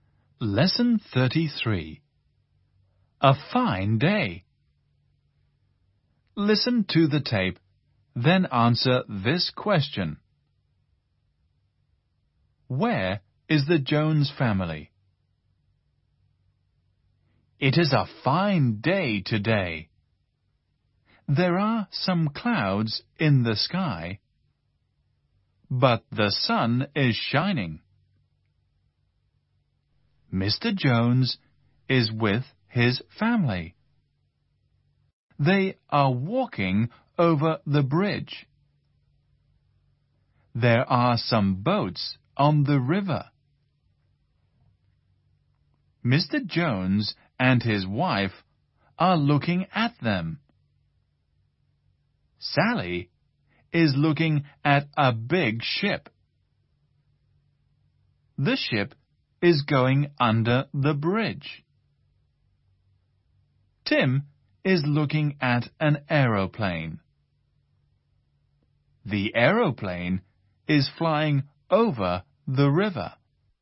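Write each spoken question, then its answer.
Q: Where is the Jones family?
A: They are walking over the bridge.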